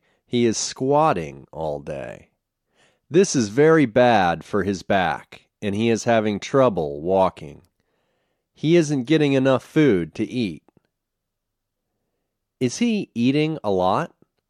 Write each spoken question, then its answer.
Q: Is he eating a lot?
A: No, he isn't eating a lot.